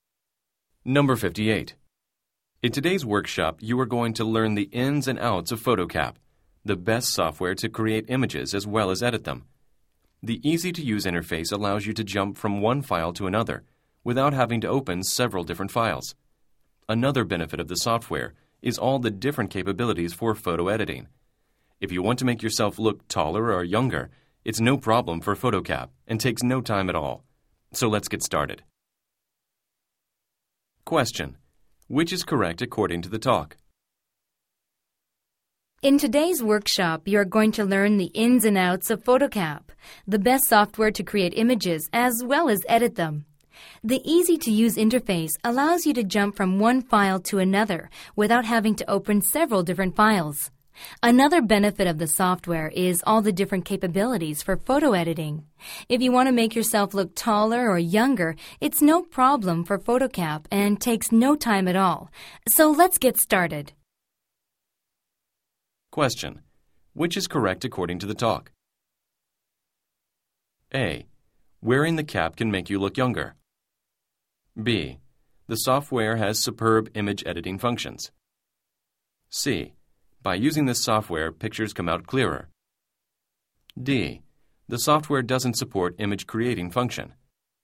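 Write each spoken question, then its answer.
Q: which is correct according to the talk?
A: B: The software has superb image editing functions.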